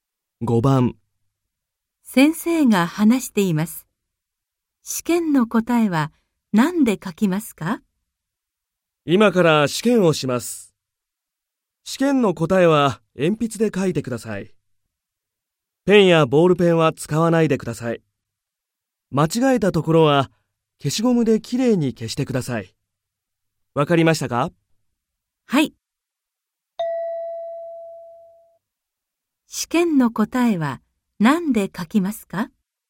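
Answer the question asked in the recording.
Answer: 鉛筆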